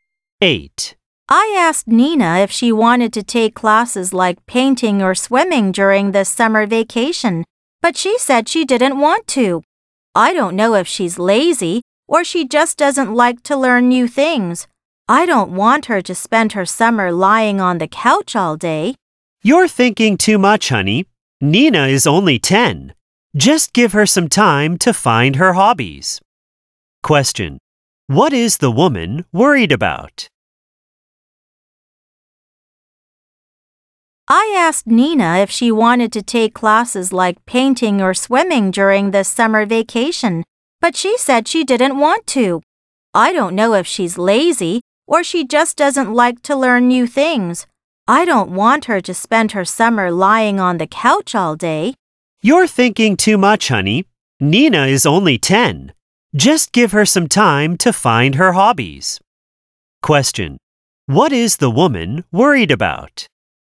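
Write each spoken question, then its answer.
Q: What is the woman worried about?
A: That Nina doesn't want to take classes and will waste her summer lying on the couch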